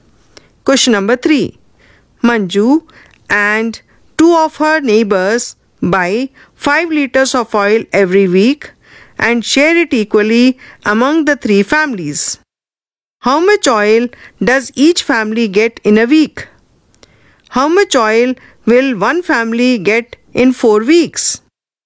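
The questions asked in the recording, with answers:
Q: How much oil does each family get in a week?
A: 1 2/3 liters

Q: How much oil will one family get in 4 weeks?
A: 6 2/3 liters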